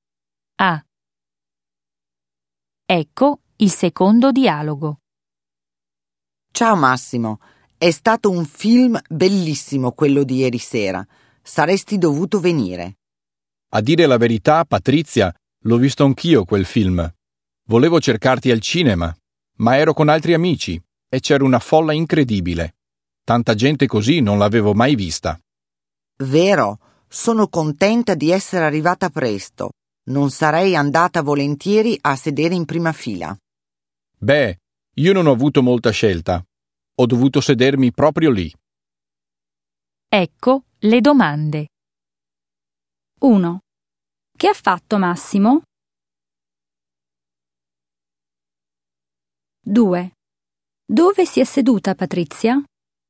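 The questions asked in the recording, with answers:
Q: Che ha fatto Massimo?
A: Ha visto anche lui il film al cinema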